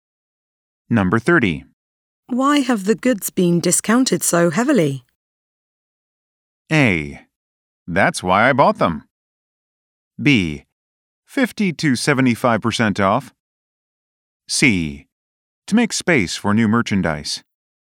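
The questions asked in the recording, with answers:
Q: Why have the goods been discounted so heavily?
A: C: To make space for new merchandise.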